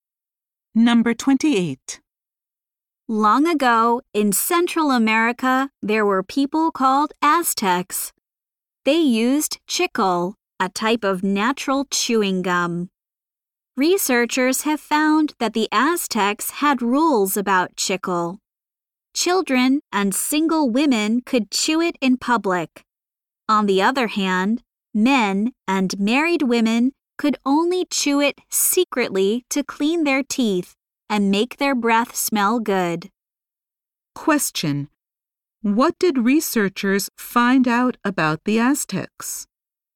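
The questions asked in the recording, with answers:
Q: What did researchers find out about the Aztecs?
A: They had rules about chewing chicle.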